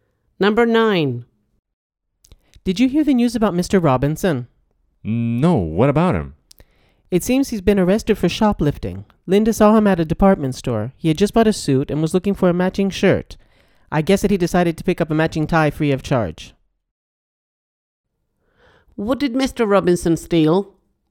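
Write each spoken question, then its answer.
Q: What did Mr. Robinson steal?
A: a tie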